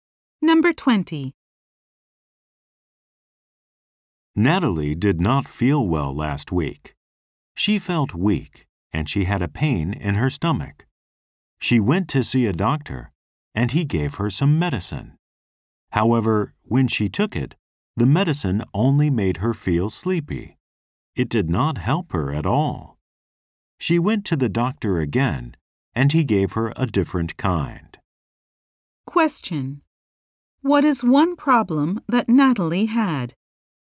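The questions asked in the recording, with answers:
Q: What is one problem that Natalie had?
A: Her medicine made her sleepy and did not help.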